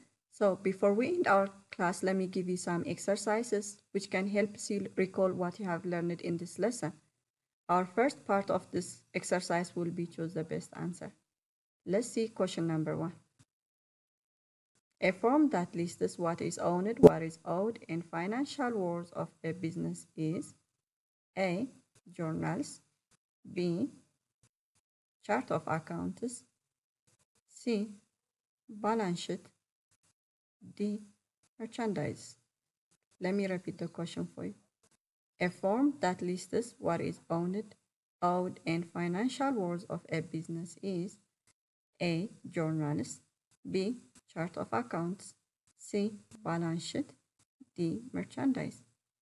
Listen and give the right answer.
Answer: The answer for this question is choice C, which is balance sheet.